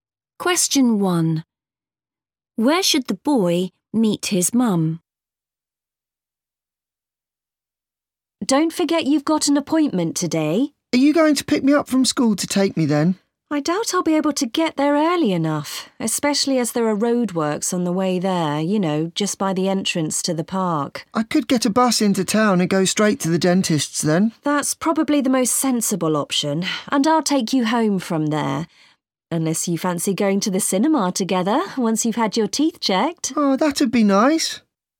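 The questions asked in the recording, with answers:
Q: Where should the boy meet his mum?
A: At the dentist's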